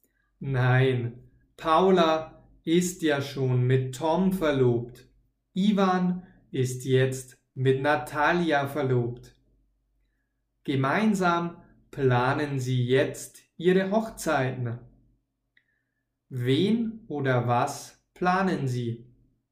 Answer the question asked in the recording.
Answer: Ihre Hochzeiten. Sie planen jetzt ihre Hochzeiten.